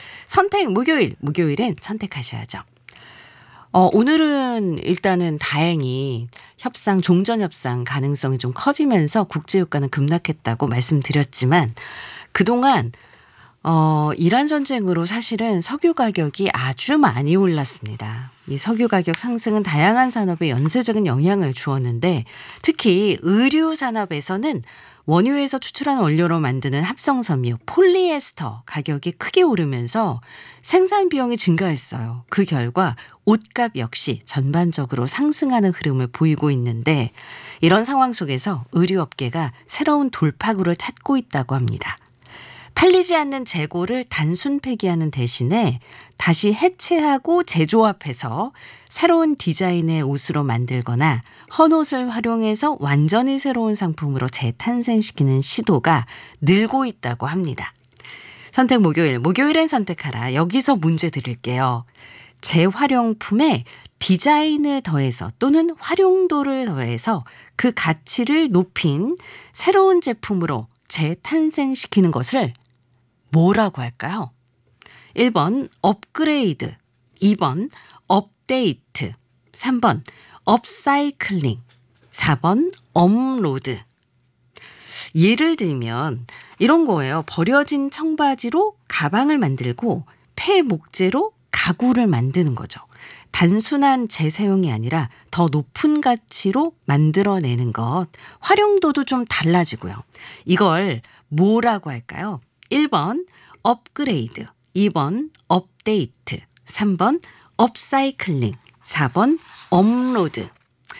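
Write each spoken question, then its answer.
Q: 재활용품에 디자인을 더해서 또는 활용도를 더해서 그 가치를 높인 새로운 제품으로 재탄생시키는 것을 뭐라고 할까요?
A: 3번: 업사이클링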